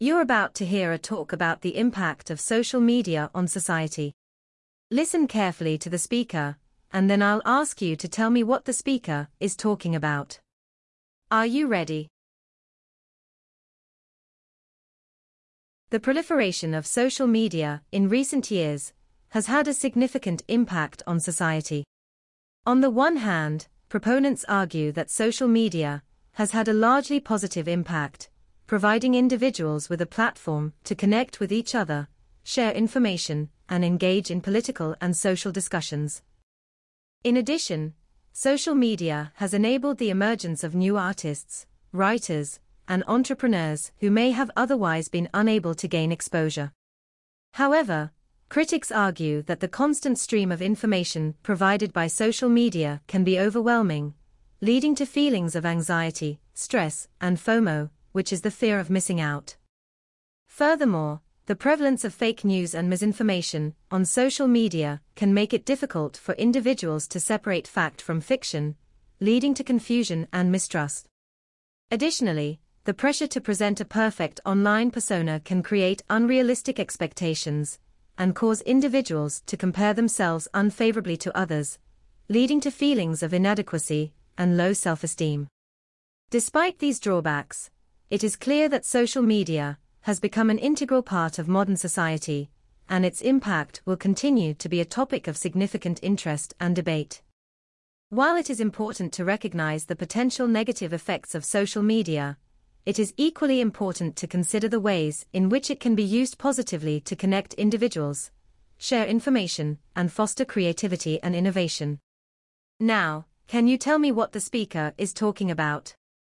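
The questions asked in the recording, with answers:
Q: Now, can you tell me what the speaker is talking about?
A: The impact of social media on society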